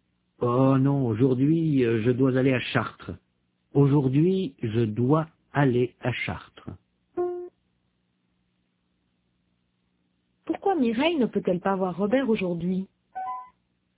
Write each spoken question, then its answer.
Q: Pourquoi Mireille ne peut-elle pas voir Robert aujourd'hui?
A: Parce qu'elle doit aller à Chartres.